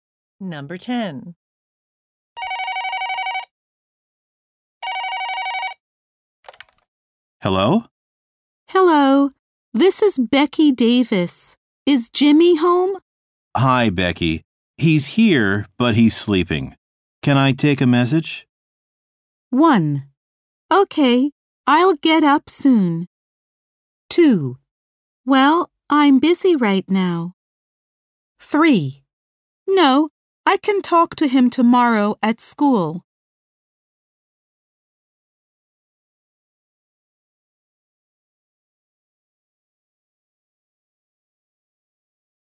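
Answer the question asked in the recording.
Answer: 3: No, I can talk to him tomorrow at school.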